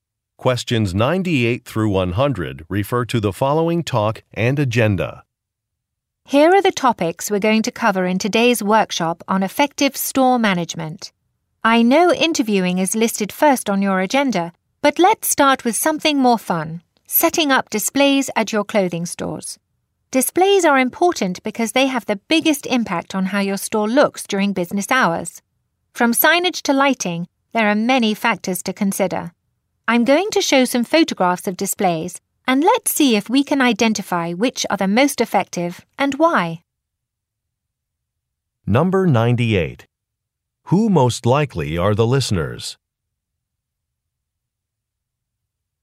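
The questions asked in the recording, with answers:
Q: Who most likely are the listeners?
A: Clothing store managers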